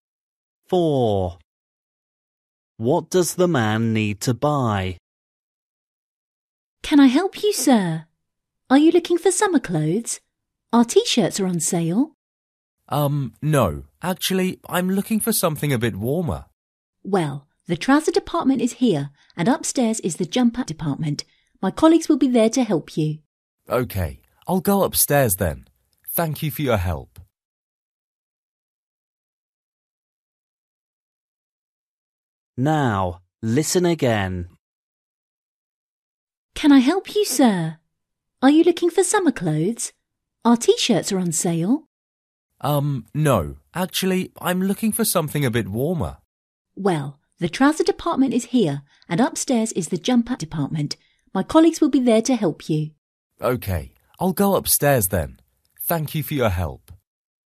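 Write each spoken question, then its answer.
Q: What does the man need to buy?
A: A jumper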